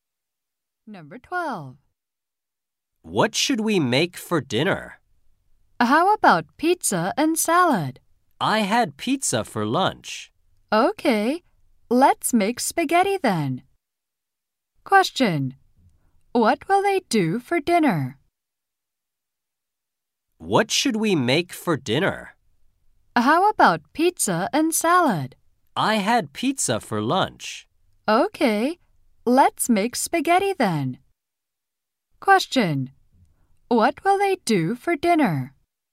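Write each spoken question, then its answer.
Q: What will they do for dinner?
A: Make spaghetti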